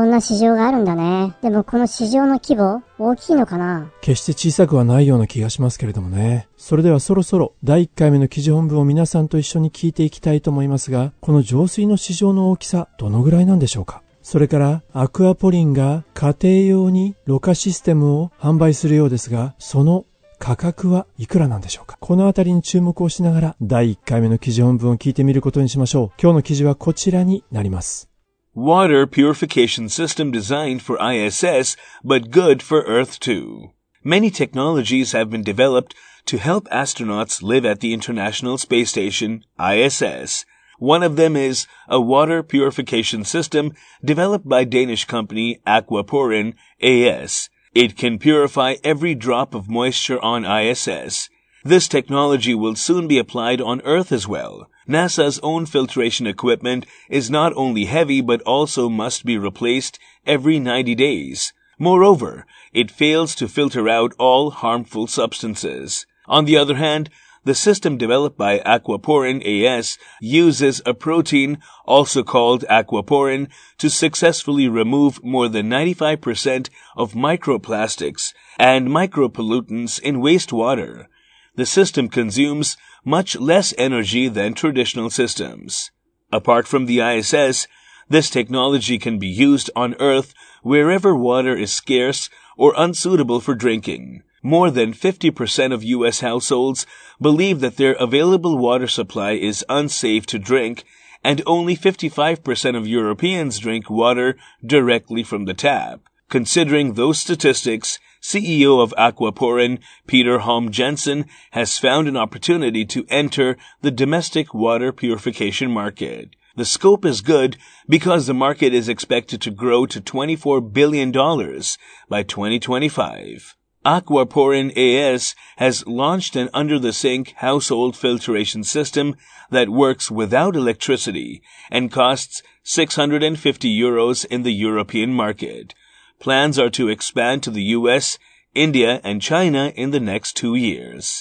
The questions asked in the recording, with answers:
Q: この浄水の市場の大きさどのぐらいなんでしょうか?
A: 市場規模は2025年までに24 billion dollars、240億ドルに expected to grow、成長すると予想されているんです。

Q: それからアクアポリンが家庭用にろ過システムを販売するようですが、その価格はいくらなんでしょうか?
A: はい、まず価格ですが、ヨーロッパ市場で650ユーロということでしたね。